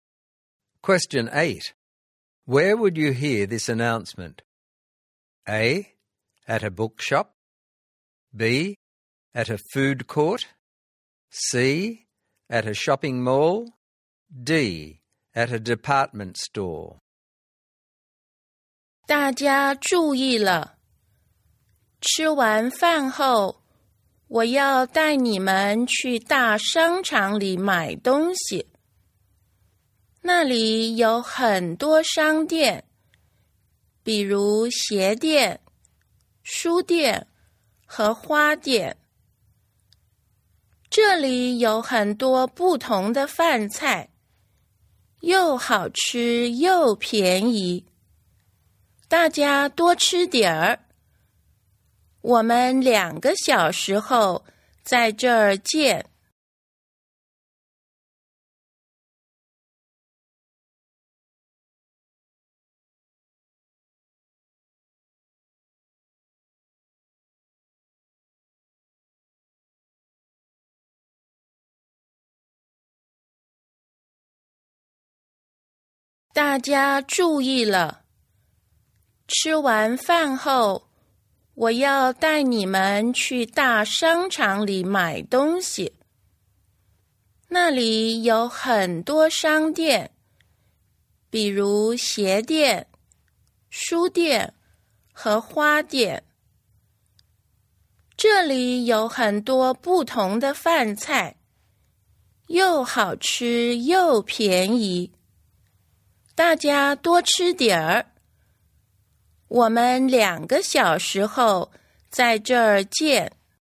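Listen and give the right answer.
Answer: B: At a food court.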